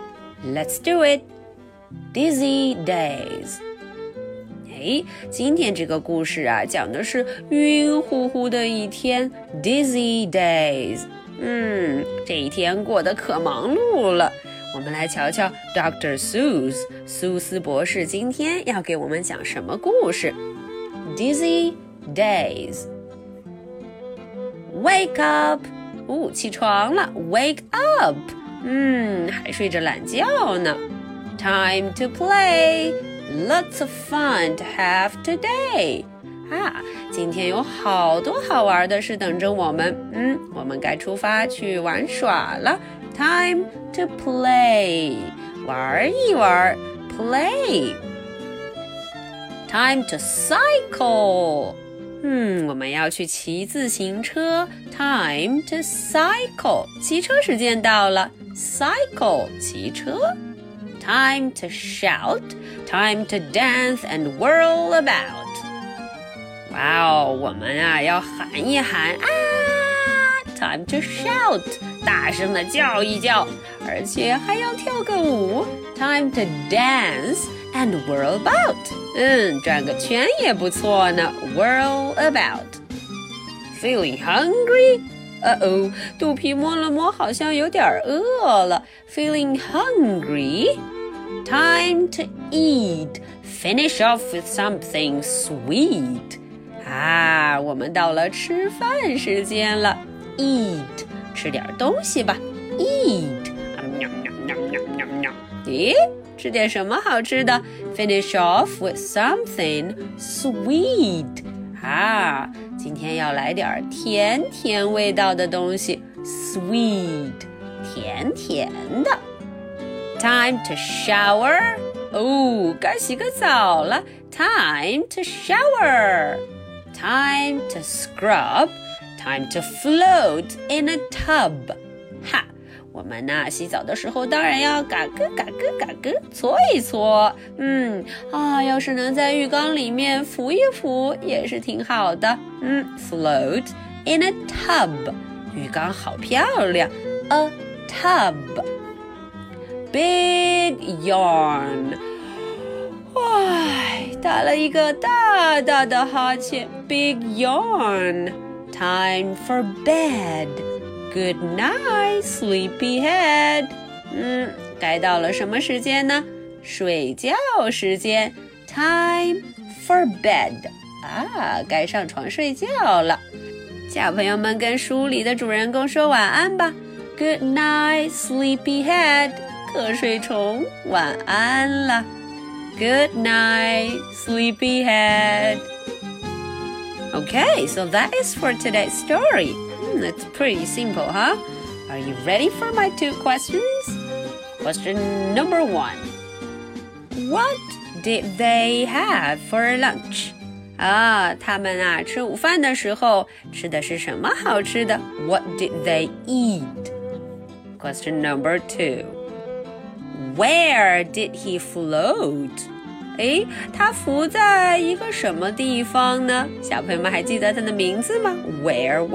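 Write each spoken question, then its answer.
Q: Where did he float?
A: In a tub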